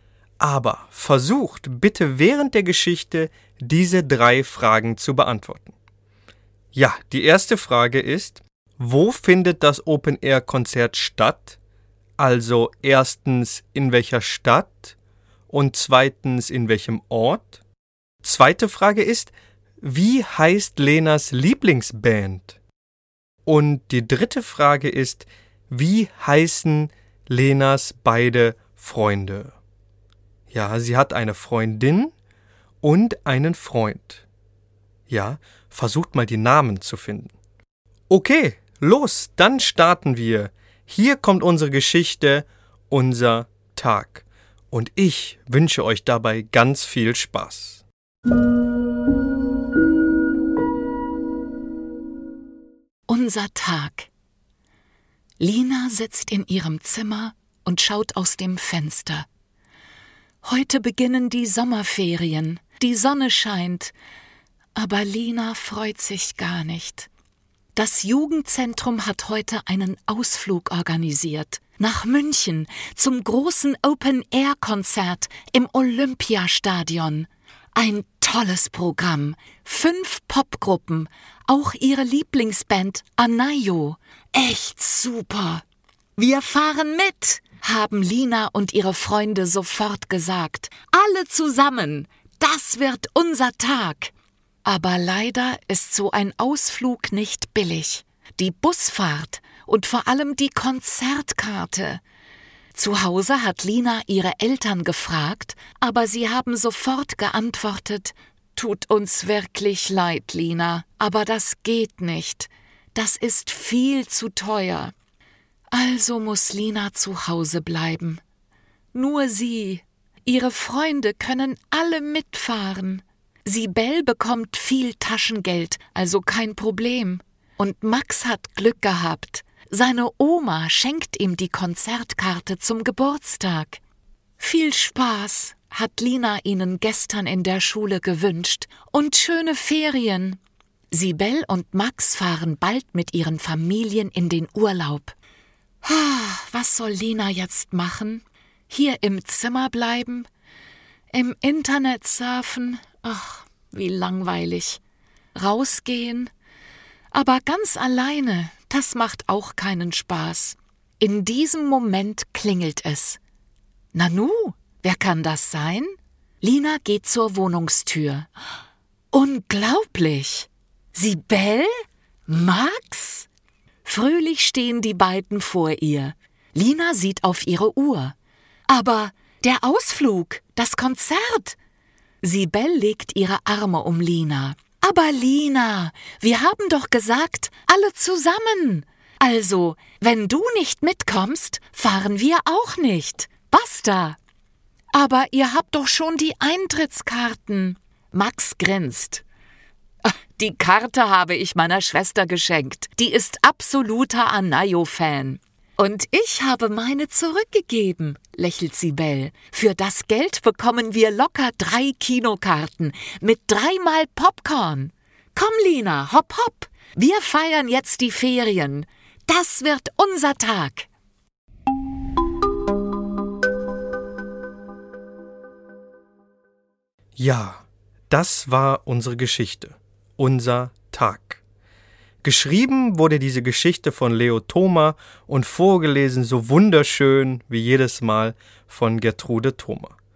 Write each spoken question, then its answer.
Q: wo findet das Open-Air-Konzert statt?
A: Ja, München, richtig? Ja, die Stadt heißt München, eine wunderschöne Stadt in Deutschland.

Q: wie heißt Lenas Lieblingsband?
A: Die Band heißt Anayo.

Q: wie heißen Lenas beide Freunde?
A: Also, ihre Freundin heißt Sibel und ihr Freund heißt Max.